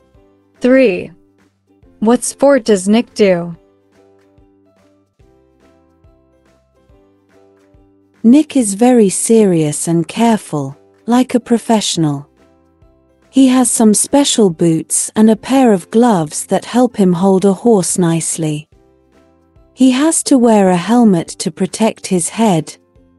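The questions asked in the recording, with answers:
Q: What sport does Nick do?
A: horse riding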